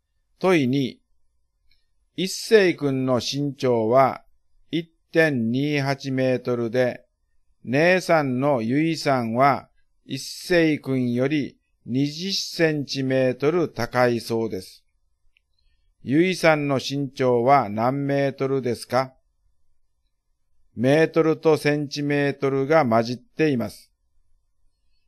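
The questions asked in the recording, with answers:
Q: ゆいさんの身長は何メートルですか?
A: 1.48メートル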